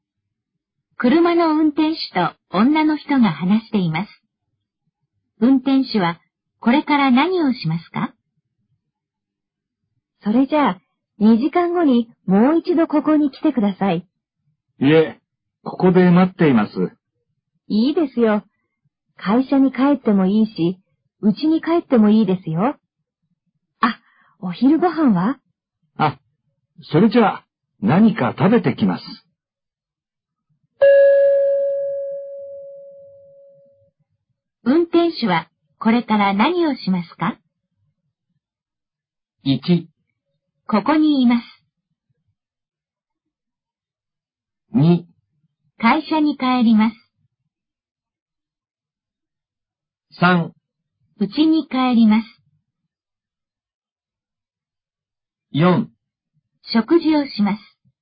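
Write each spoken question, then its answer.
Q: 運転手はこれから何をしますか?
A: 4: 食事をします。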